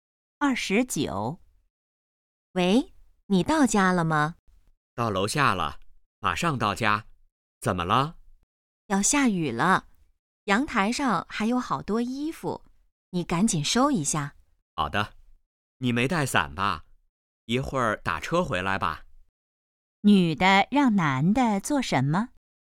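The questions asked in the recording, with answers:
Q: 女的让男的做什么?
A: 收阳台上的衣服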